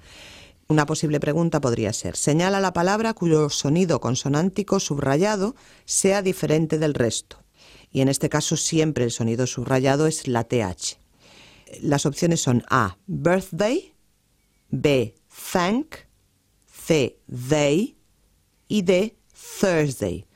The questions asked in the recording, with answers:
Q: señala la palabra cuyo sonido consonántico subrayado sea diferente del resto.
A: la C, they, es el sonido que suena como D, en cambio los otros suenan todos como Z